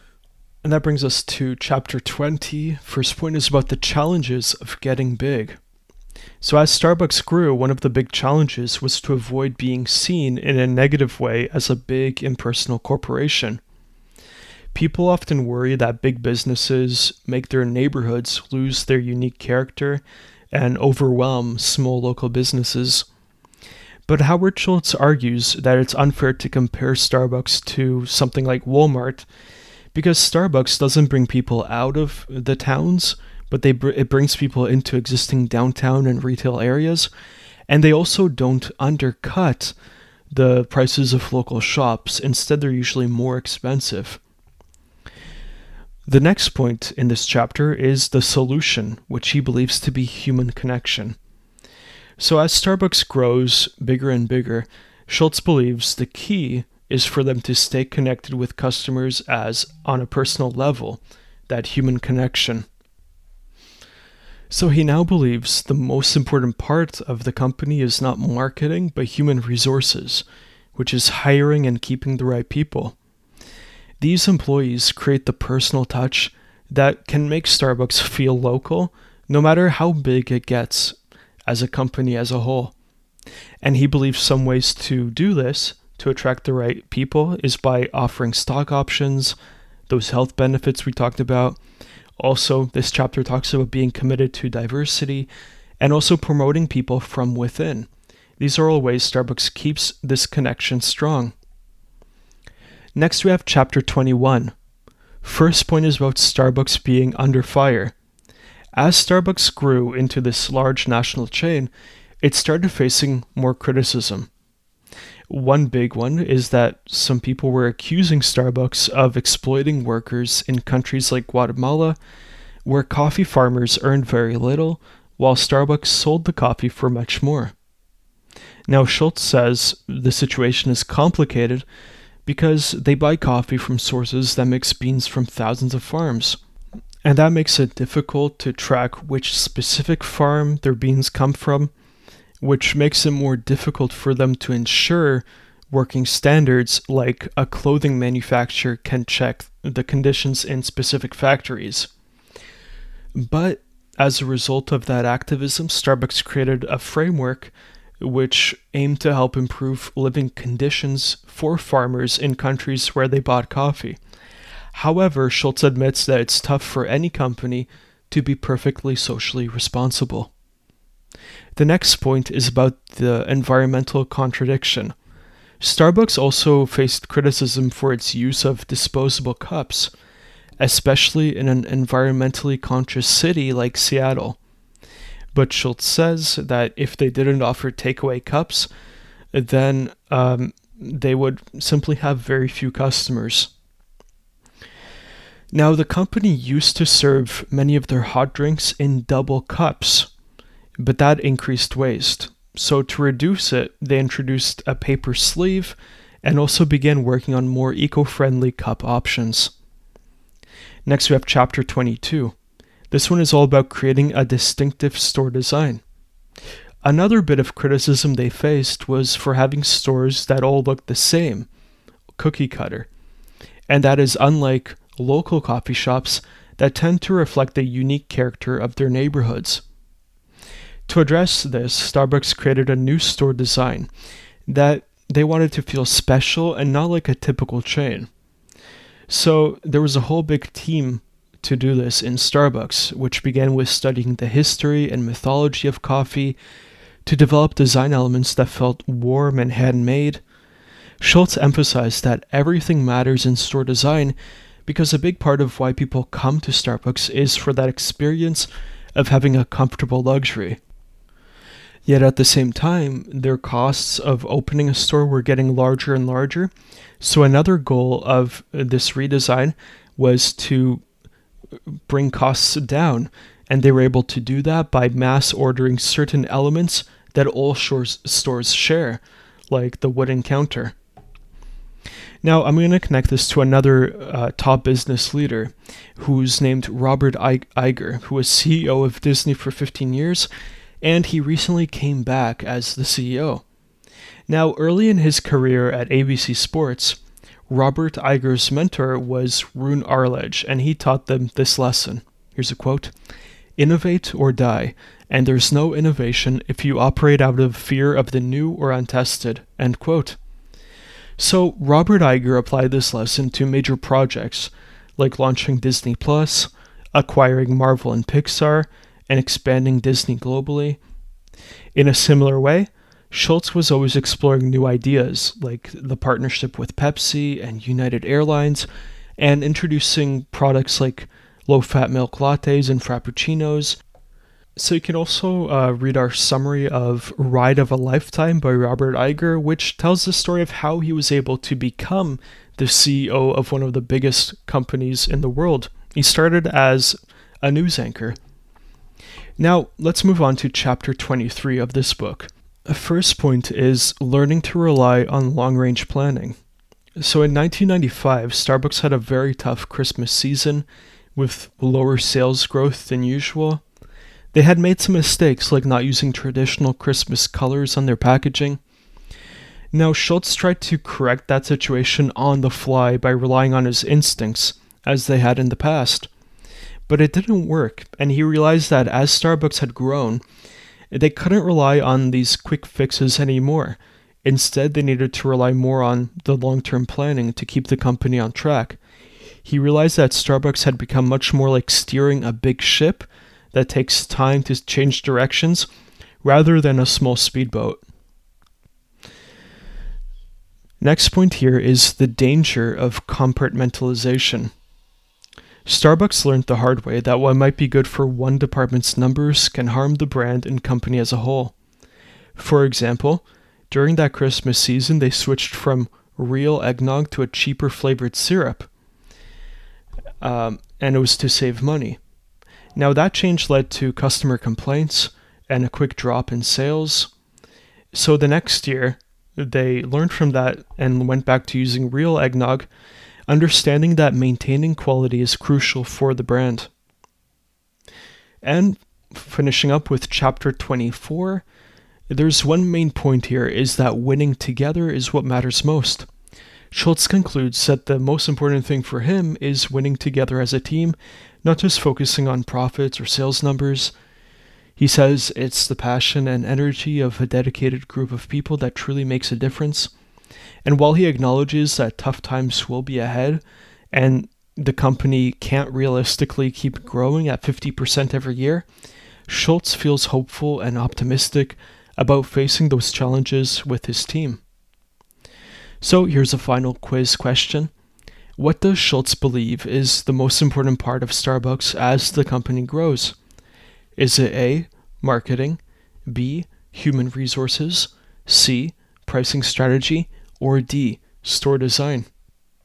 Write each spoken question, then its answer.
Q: What does Schultz believe is the most important part of Starbucks as the company grows?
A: So the correct answer here is B, human resources.